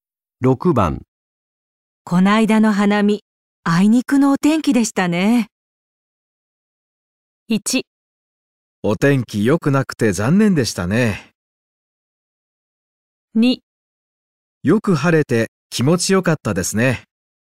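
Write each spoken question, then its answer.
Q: こないだの花見、あいにくのお天気でしたね。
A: 1: お天気良くなくて残念でしたね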